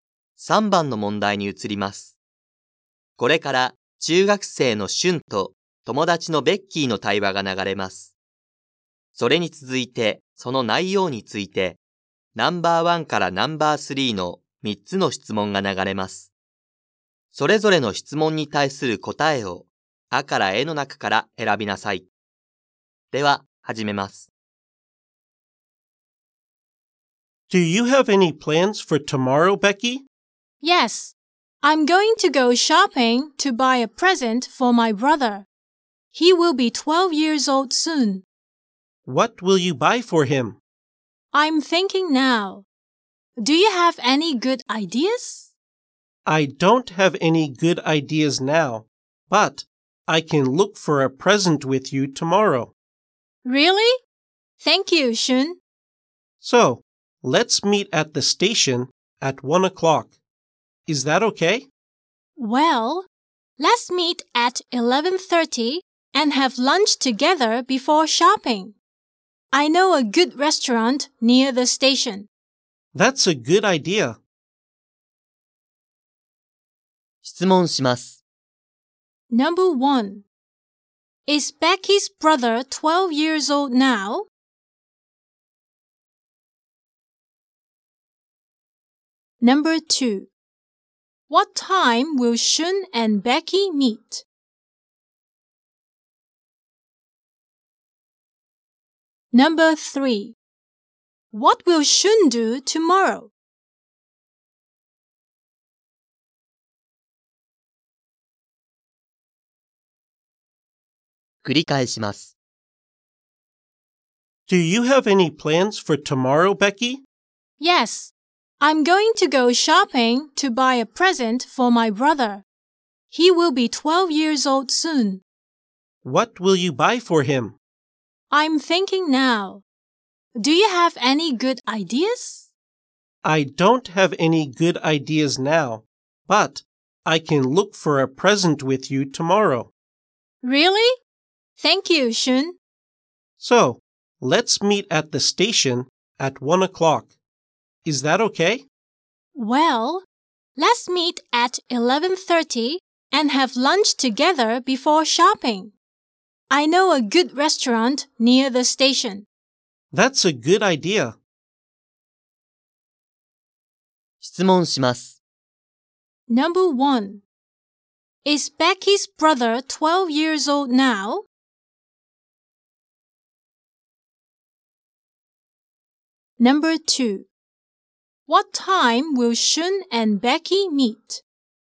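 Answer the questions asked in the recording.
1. No, he isn't (he will be 12 soon)
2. At 11:30
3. He will have lunch with Becky and help her look for a present for her brother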